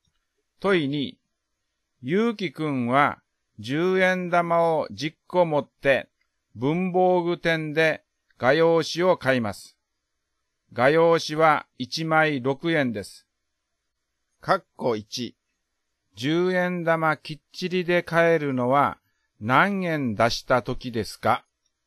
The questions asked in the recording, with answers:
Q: 括弧1、10円玉きっちりで買えるのは何円出した時ですか?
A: 括弧1の答えは30円、60円、90円です。